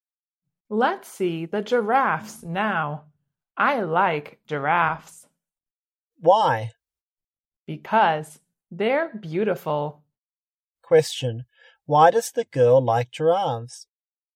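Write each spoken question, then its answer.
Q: Question, why does the girl like giraffes?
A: Because they're beautiful.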